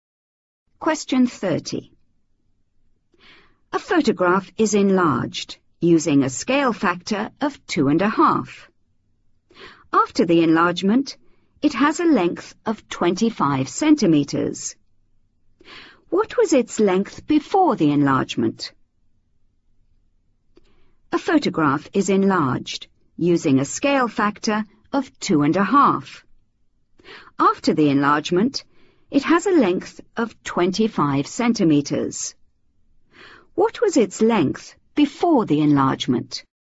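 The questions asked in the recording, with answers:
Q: What was its length before the enlargement?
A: 10 cm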